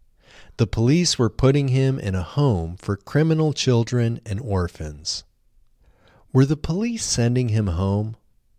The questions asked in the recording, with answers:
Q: Were the police sending him home?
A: No, the police weren't sending him home.